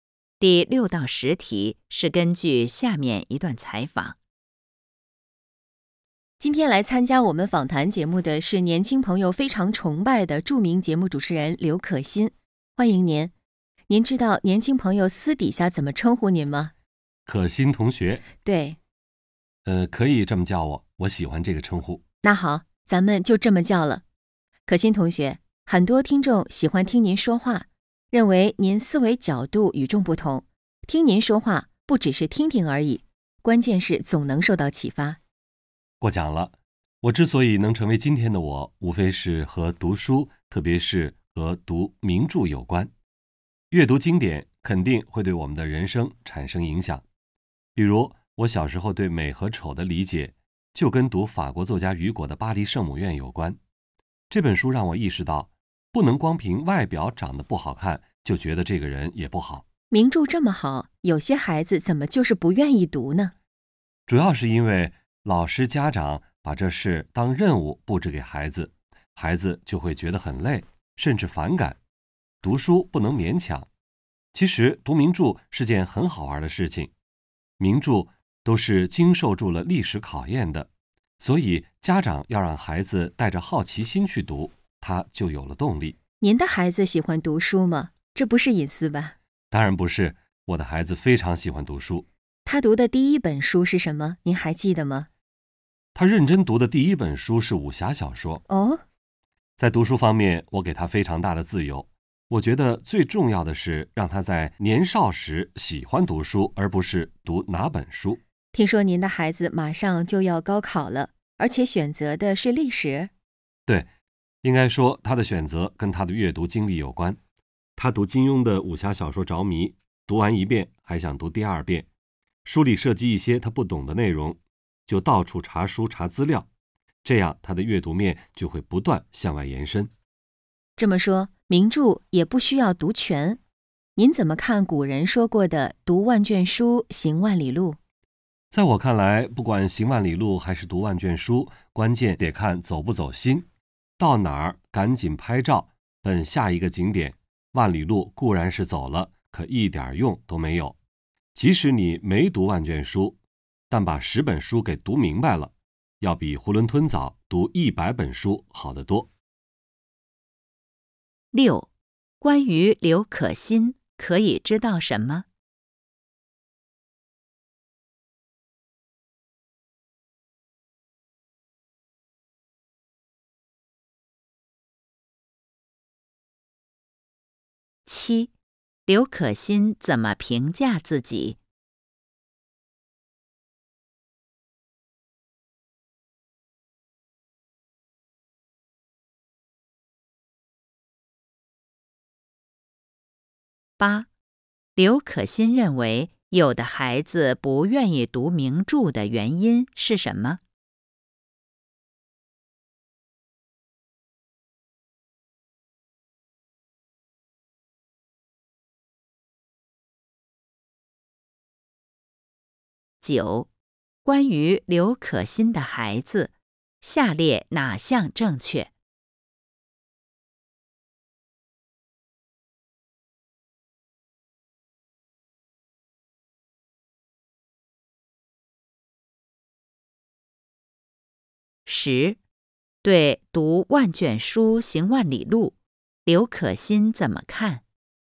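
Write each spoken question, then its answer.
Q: 刘可欣认为有的孩子不愿意读名著的原因是什么?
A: 老师和家长把读名著当任务布置给孩子,孩子觉得累,甚至反感

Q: 对读万卷书行万里路,刘可欣怎么看?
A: 关键看走不走心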